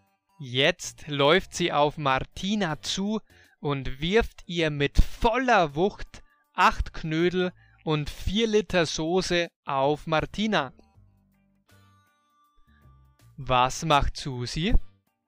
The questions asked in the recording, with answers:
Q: Was macht Susi?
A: Sie läuft auf Martina zu und wirft mit voller Wucht 8 Knödel und 4 Liter Soße auf Martina.